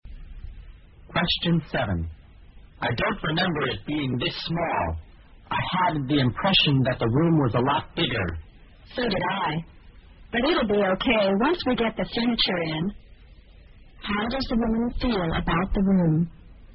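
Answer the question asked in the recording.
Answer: She also thought it was bigger, but thinks it will be okay once the furniture is in.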